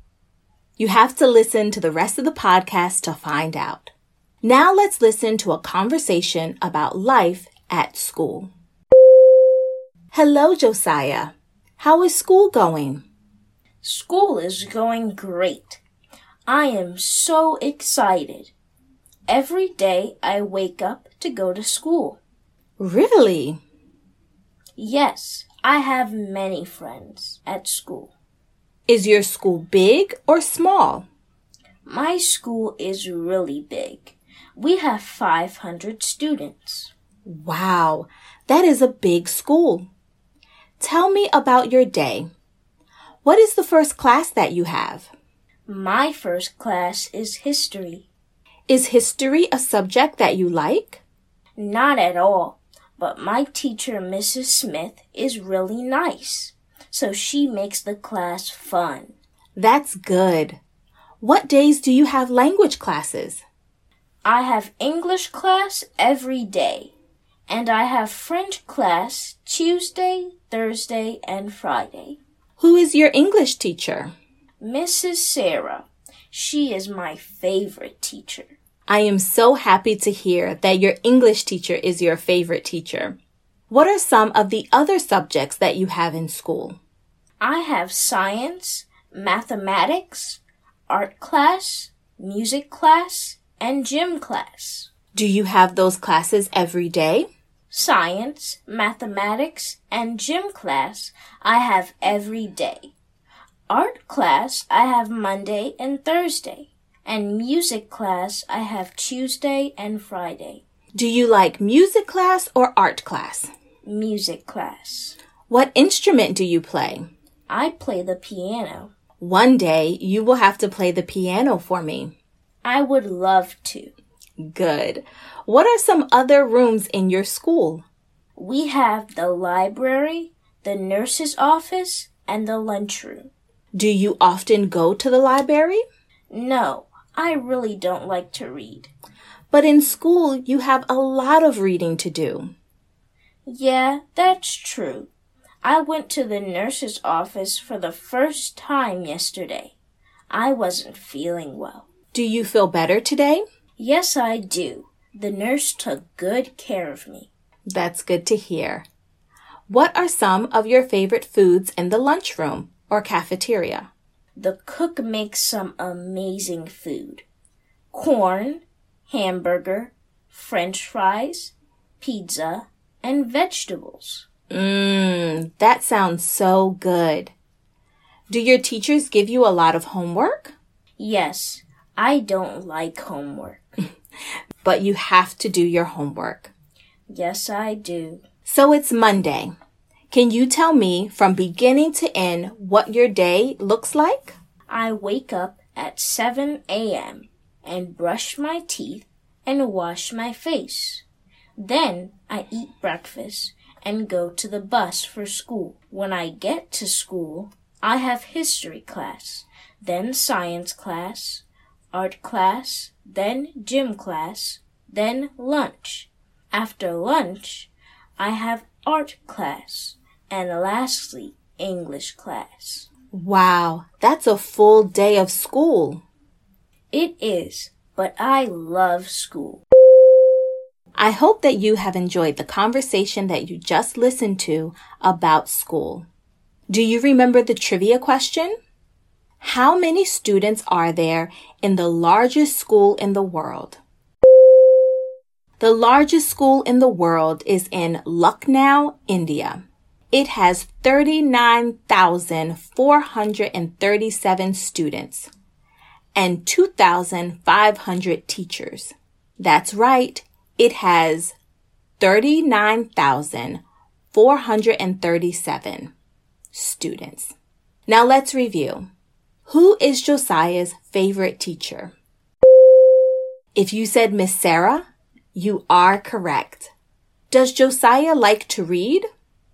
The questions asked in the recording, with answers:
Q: Does Josiah like to read?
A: No, he does not.